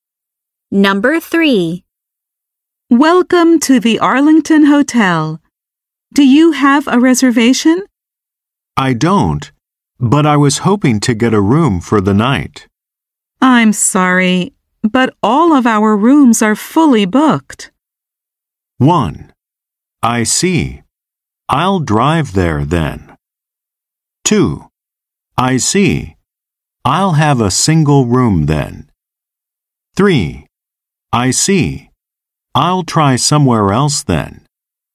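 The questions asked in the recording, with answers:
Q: I'm sorry, but all of our rooms are fully booked.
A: 3: I see. I'll try somewhere else then.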